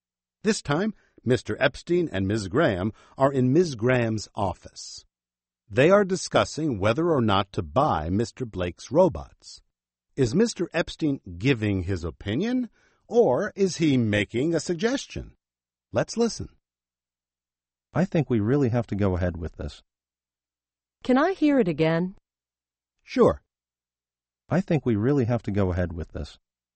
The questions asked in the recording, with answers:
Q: Is Mr. Epstein giving his opinion, or is he making a suggestion?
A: He's giving his opinion.